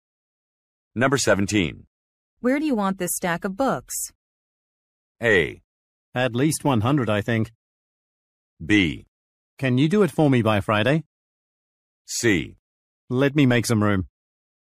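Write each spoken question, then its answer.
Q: Where do you want this stack of books?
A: C: Let me make some room.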